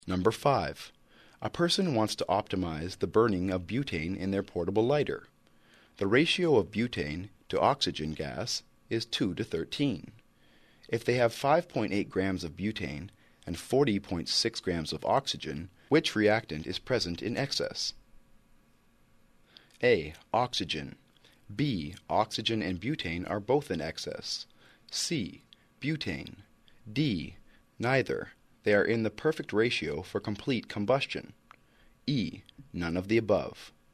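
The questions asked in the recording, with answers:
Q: If they have 5.8 grams of butane and 40.6 grams of oxygen, which reactant is present in excess?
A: A: Oxygen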